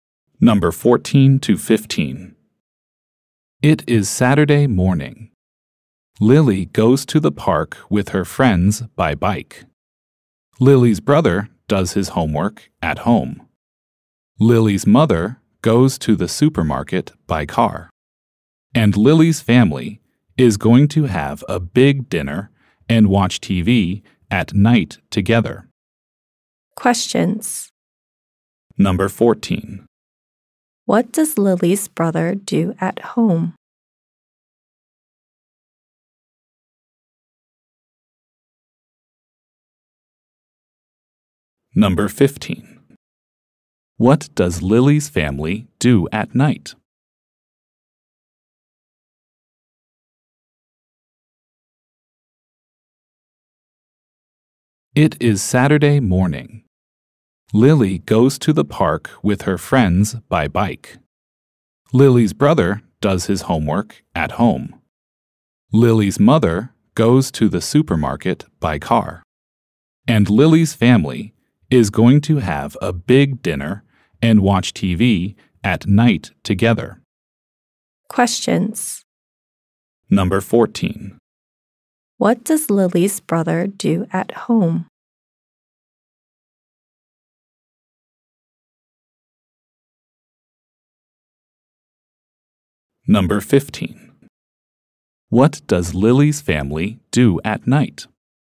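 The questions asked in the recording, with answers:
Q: What does Lily's brother do at home?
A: He does his homework.

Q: What does Lily's family do at night?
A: They have a big dinner and watch TV together.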